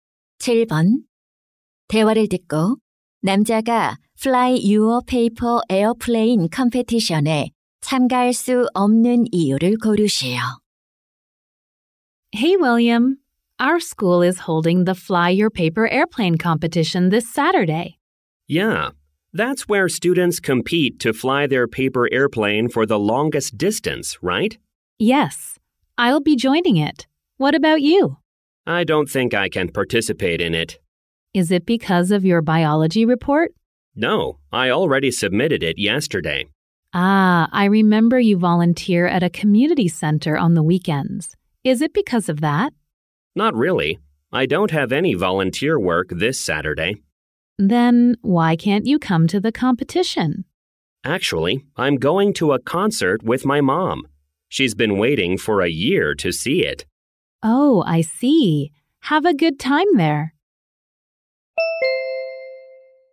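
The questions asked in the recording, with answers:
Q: 대화를 듣고 남자가 Fly Your Paper Airplane Competition에 참가할 수 없는 이유를 고르시오.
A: 엄마와 콘서트에 가야 해서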